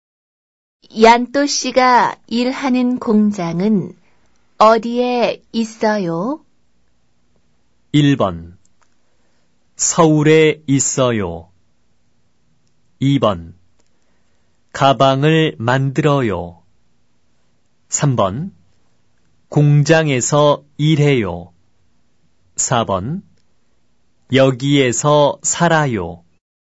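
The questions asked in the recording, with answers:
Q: 얀또 씨가 일하는 공장은 어디에 있어요?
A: 1: 서울에 있어요.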